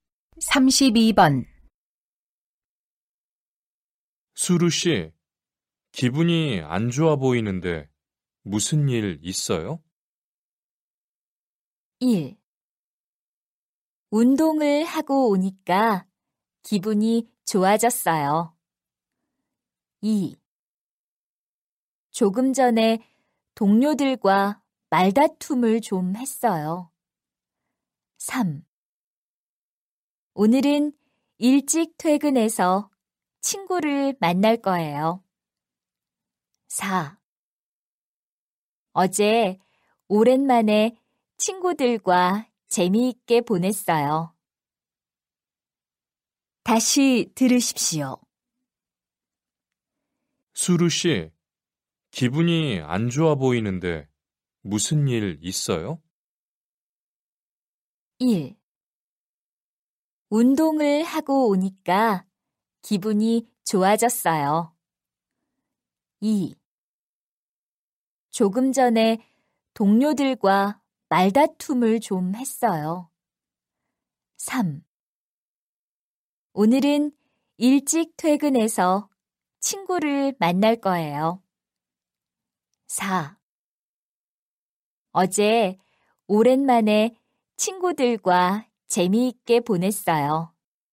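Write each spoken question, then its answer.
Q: 수루 씨, 기분이 안 좋아 보이는데 무슨 일 있어요?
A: 2: 조금 전에 동료들과 말다툼을 좀 했어요.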